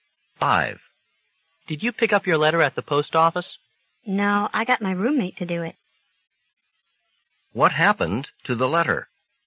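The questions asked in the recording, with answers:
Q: What happened to the letter?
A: The woman's roommate picked it up at the post office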